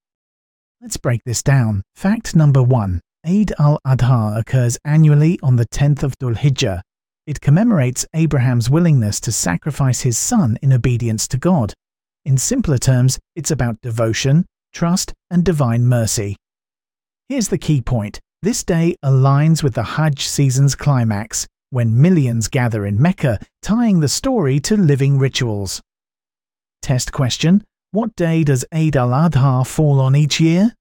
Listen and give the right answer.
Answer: 10 Dhul-Hijjah.